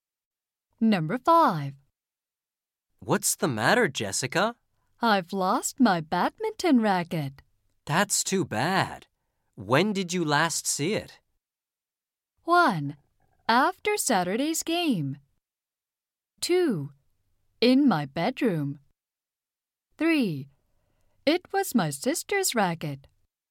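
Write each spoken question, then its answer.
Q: That's too bad. When did you last see it?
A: 1: After Saturday's game.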